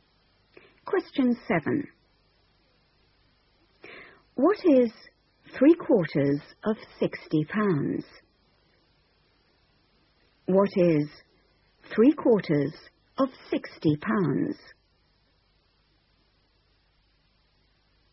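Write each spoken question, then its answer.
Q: What is 3/4 of 60 pounds?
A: £45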